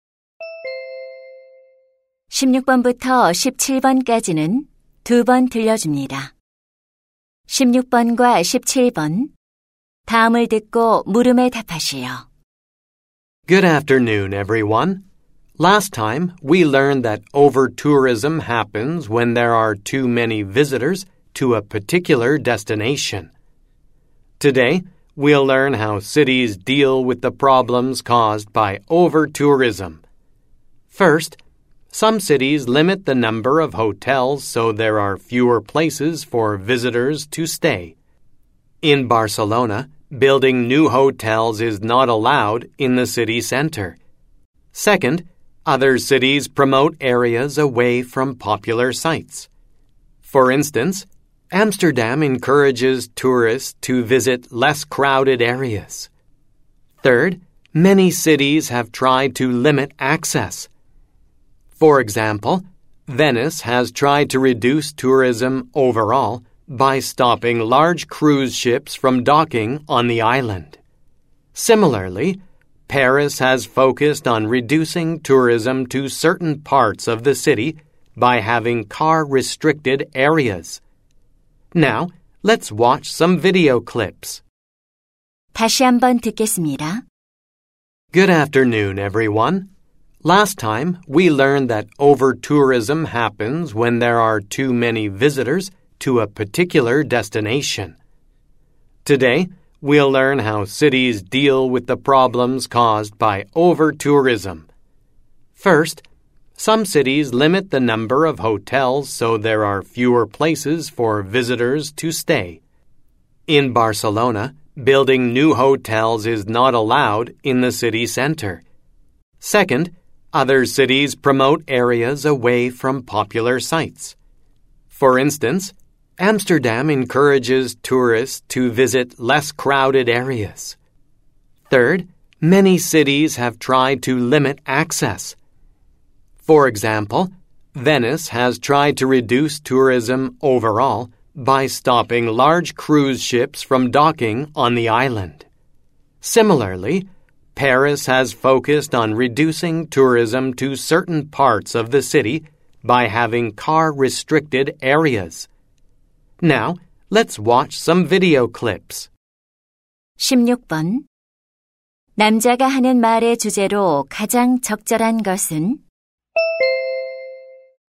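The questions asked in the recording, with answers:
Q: 남자가 하는 말의 주제로 가장 적절한 것은?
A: 도시들이 과잉 관광 문제에 대처하는 방법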